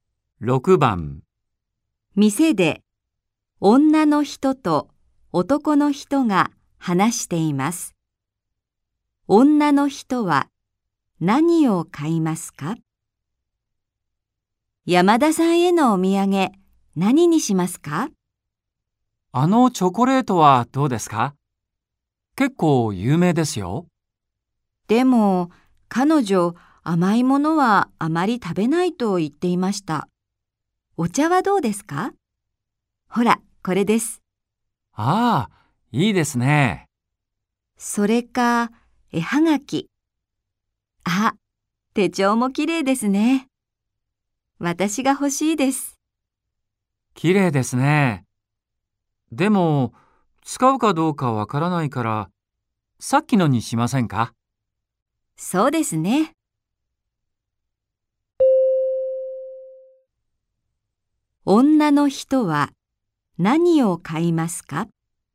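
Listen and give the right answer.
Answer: お茶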